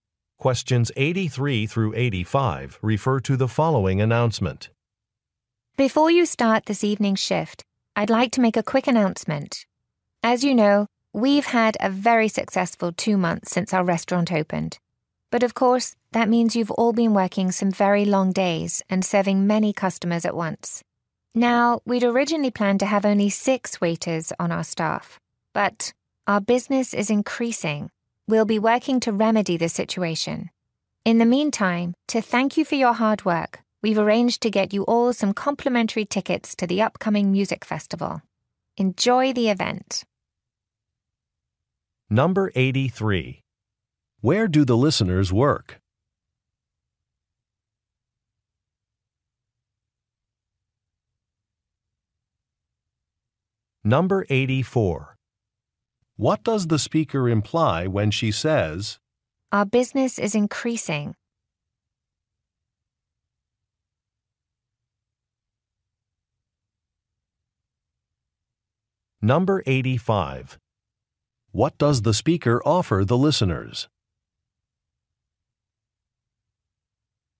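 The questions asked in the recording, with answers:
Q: Where do the listeners work?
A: At a restaurant

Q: What does the speaker offer the listeners?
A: Free tickets to a music festival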